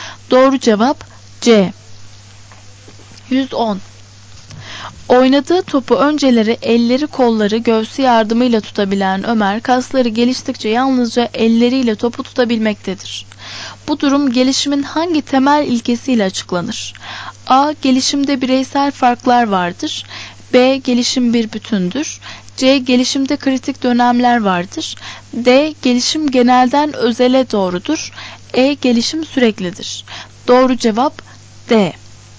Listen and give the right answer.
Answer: Doğru cevap D.